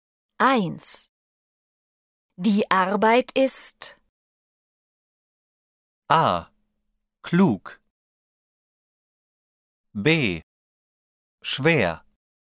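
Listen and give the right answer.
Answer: B: Schwer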